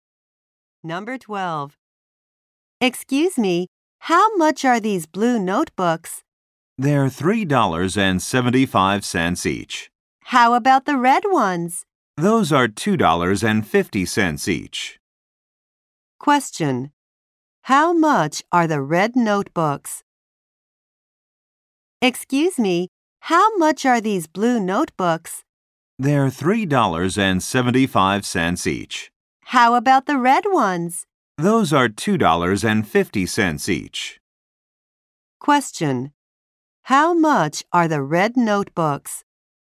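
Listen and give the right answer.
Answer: $2.50 each.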